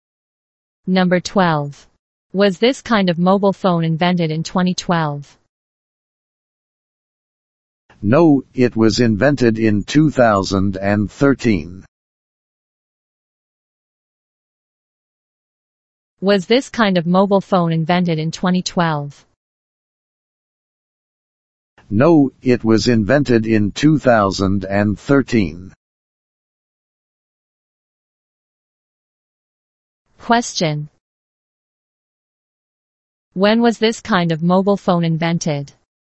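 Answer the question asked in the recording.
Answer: In 2013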